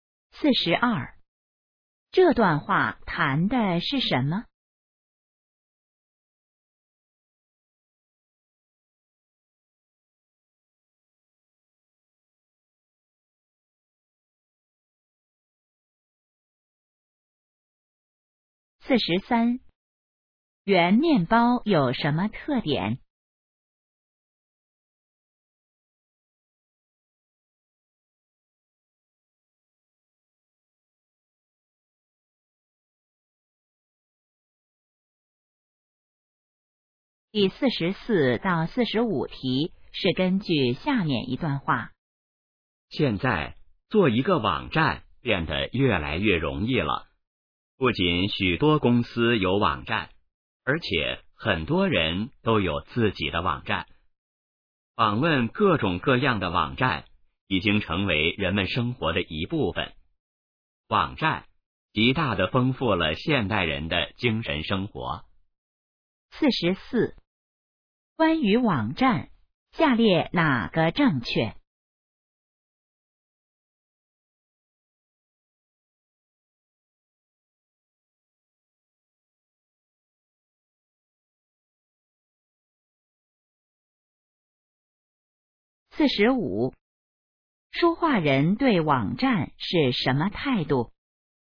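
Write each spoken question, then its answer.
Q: 关于网站,下列哪个正确?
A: 做网站越来越容易了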